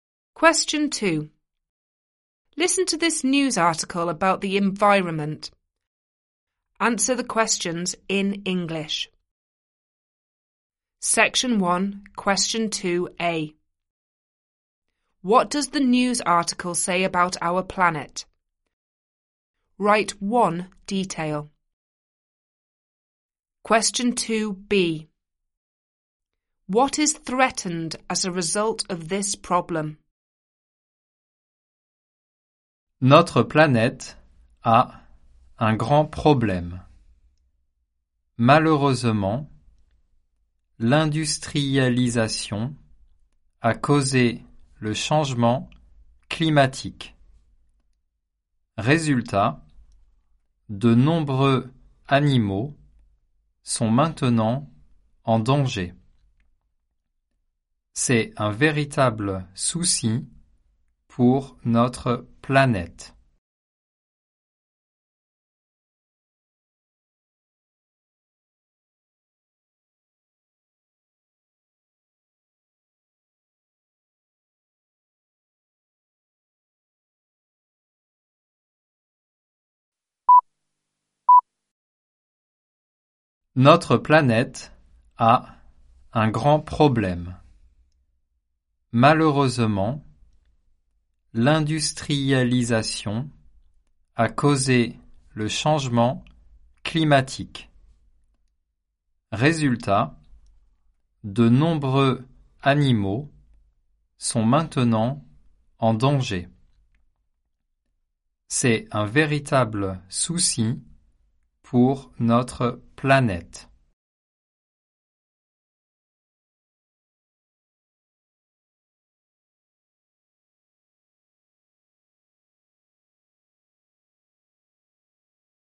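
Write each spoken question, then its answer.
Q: What does the news article say about our planet?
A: It has a big problem (climate change caused by industrialisation)

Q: What is threatened as a result of this problem?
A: Many animals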